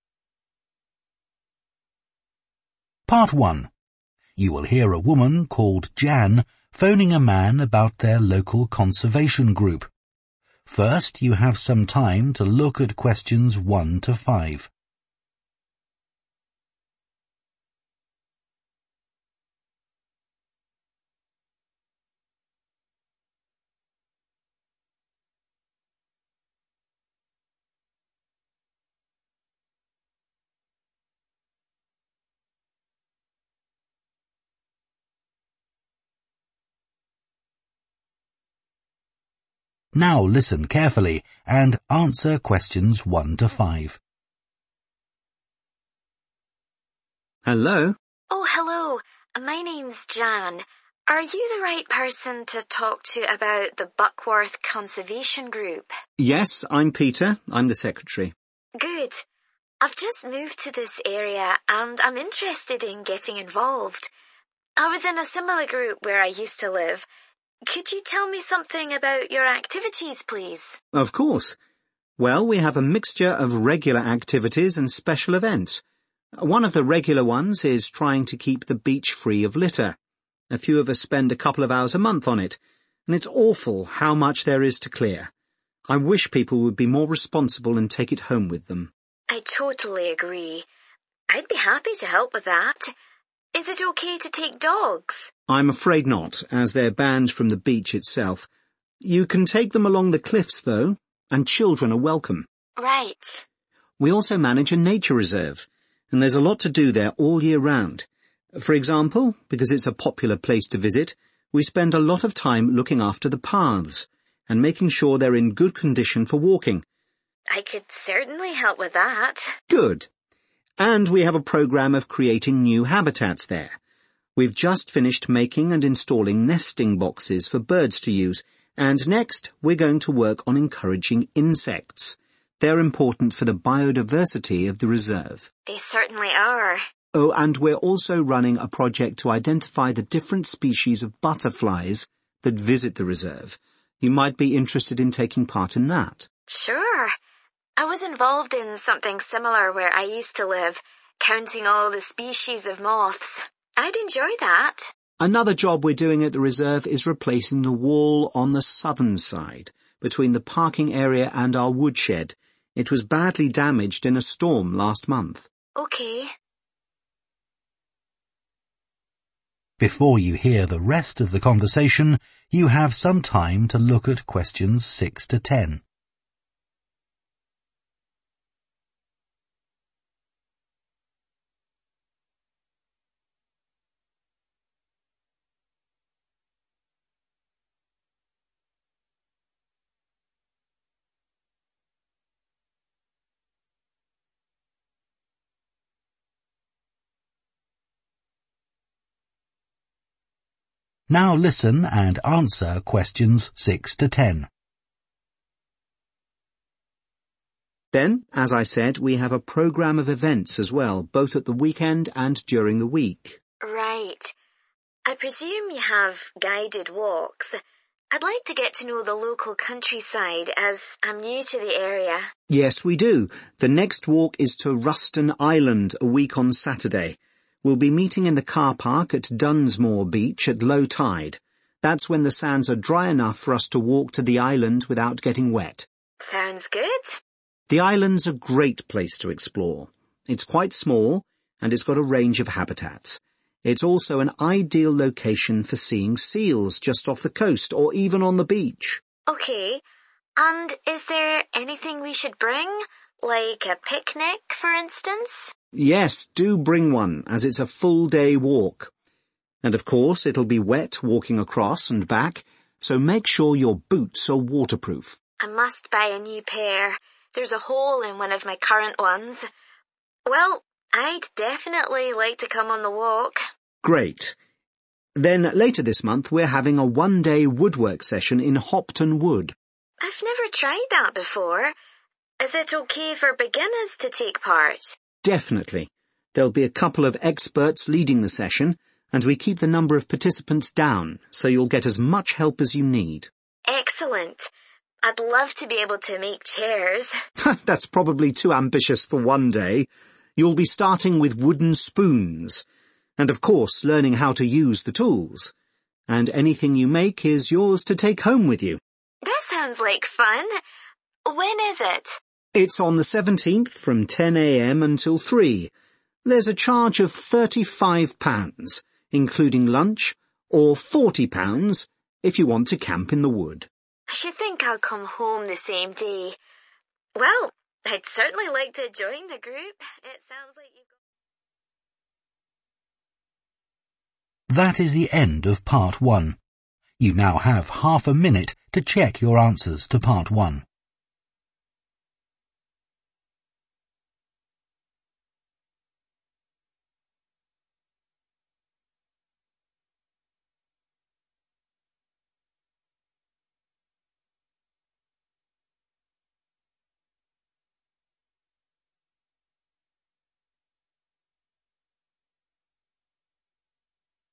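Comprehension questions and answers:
Complete the notes below. Write ONE WORD AND/ OR A NUMBER for each answer.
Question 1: making sure the beach does not have (1) on it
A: litter

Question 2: no (2)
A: dogs

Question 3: next task is taking action to attract (3) to the place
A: insects

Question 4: identifying types of (4)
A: butterflies

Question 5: building a new (5)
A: wall

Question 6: walk across the sands and reach the (6)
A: island

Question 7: wear appropriate (7)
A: boots

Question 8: suitable for (8) to participate in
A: beginners

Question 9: making (9) out of wood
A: spoons

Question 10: cost of session (no camping): (10) £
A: 35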